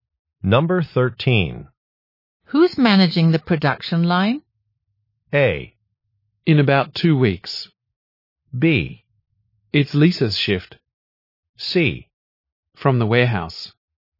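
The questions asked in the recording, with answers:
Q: Who's managing the production line?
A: B: It's Lisa's shift.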